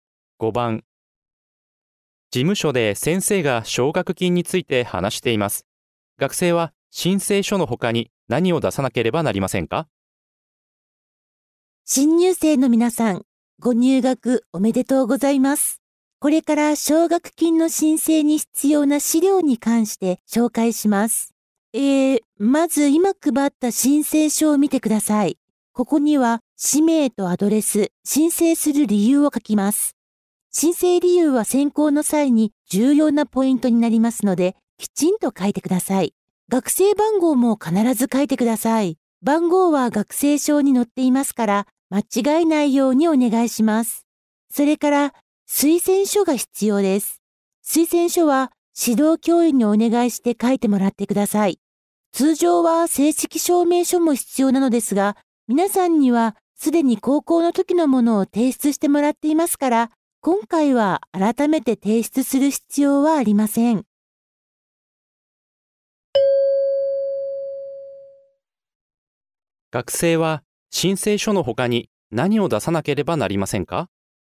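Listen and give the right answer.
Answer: 推薦書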